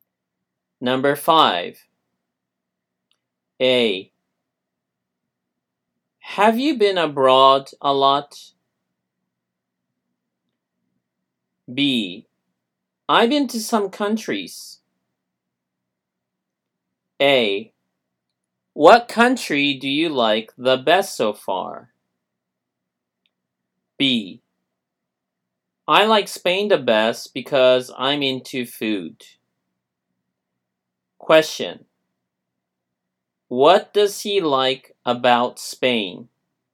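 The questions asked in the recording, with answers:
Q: What does he like about Spain?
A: The food.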